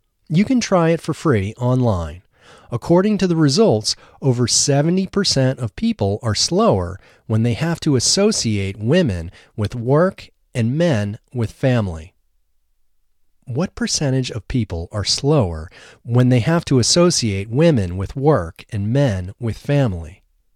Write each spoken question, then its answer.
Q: What percentage of people are slower when they have to associate women with work and men with family?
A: 70% of people are slower when they have to associate women with work and men with family.